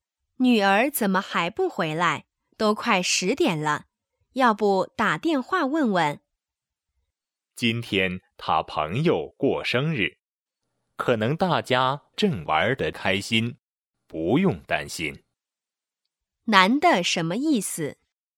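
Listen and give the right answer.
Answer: 不用担心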